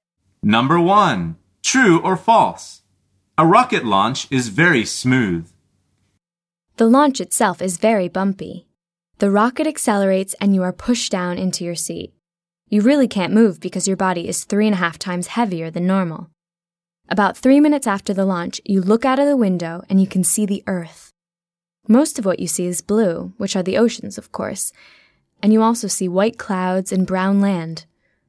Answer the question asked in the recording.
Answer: The answer is false.